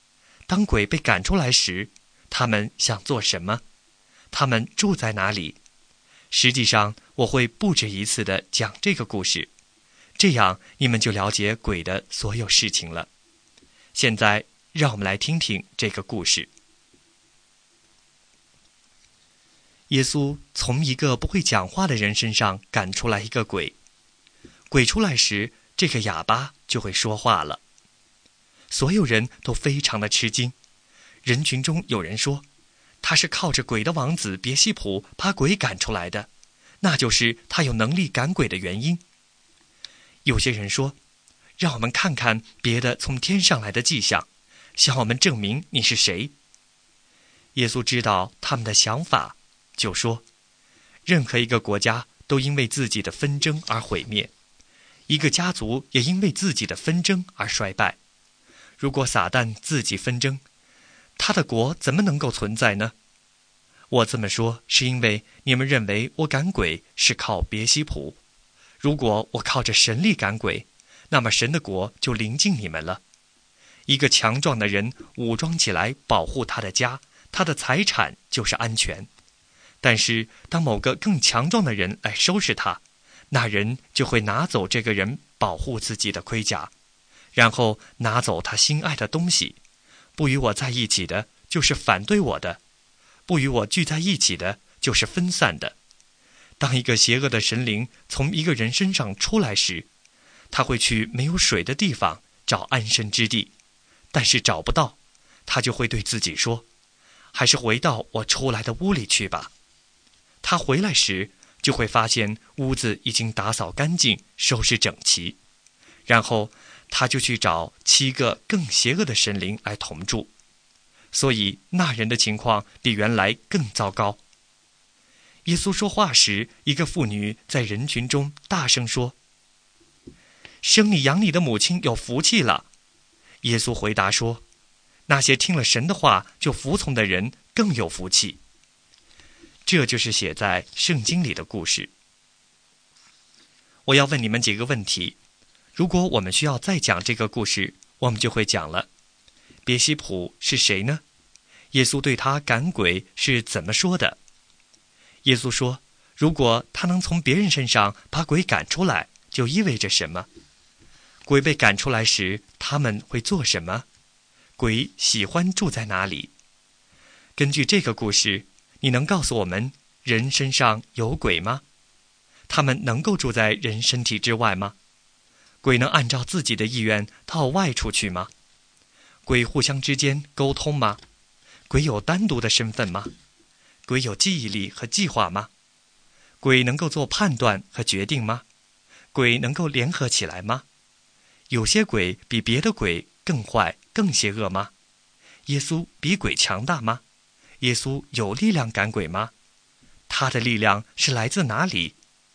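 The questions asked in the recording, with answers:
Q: 别西卜是谁呢?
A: 魔鬼的王子

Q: 耶稣说,如果他能从别人身上把鬼赶出来,就意味着什么?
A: 神的国临近了

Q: 鬼被赶出来时,他们会做什么?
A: 去没有水的地方找安身之地,找不到就回到原来的人身上,还带七个更邪恶的神灵同住

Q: 有些鬼比别的鬼更坏更邪恶吗?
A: 是的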